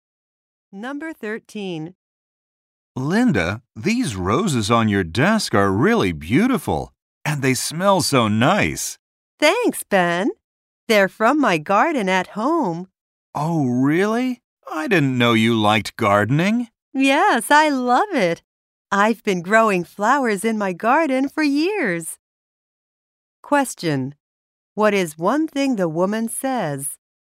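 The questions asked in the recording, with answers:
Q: What is one thing the woman says?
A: She has grown flowers in her garden for years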